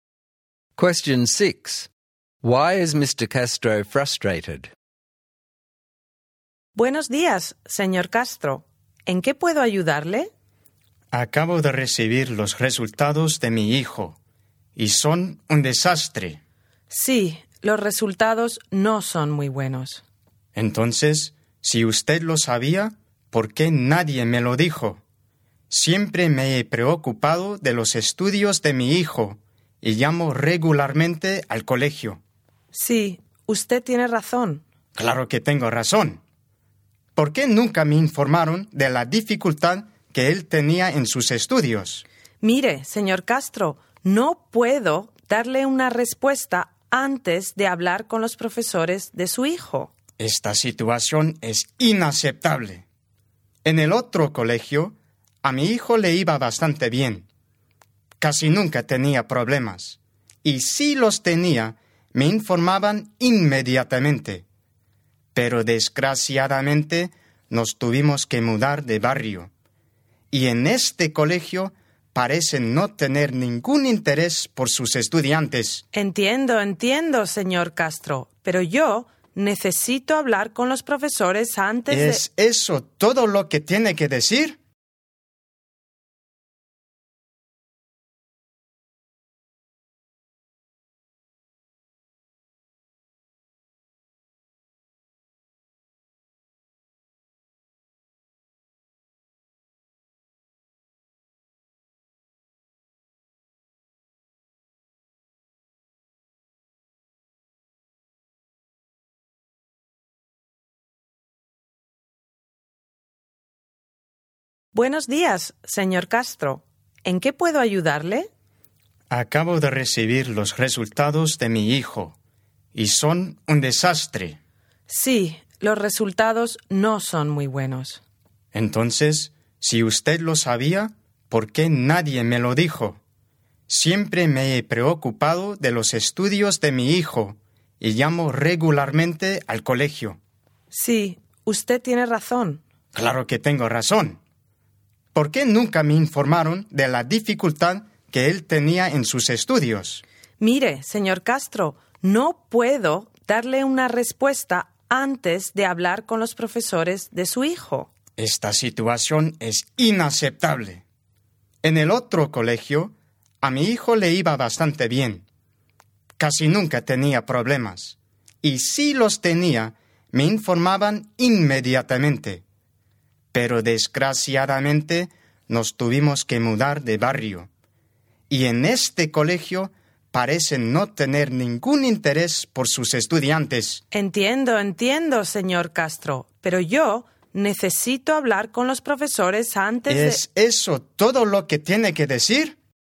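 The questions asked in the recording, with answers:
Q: Why is Mr. Castro frustrated?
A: His son's results are a disaster and the school never told him about his son's difficulties, even though he calls regularly; the school seems to have no interest in its students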